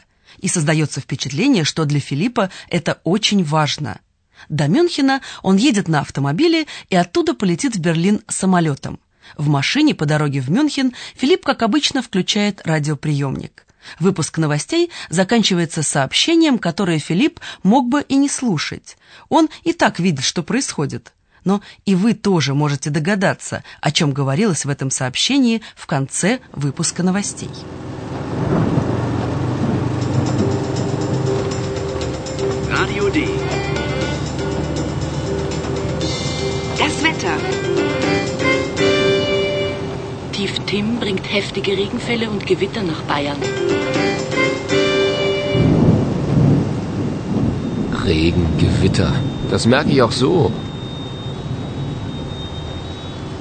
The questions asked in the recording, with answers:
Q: Но и вы тоже можете догадаться, о чем говорилось в этом сообщении в конце выпуска новостей.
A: сообщении говорилось о погоде.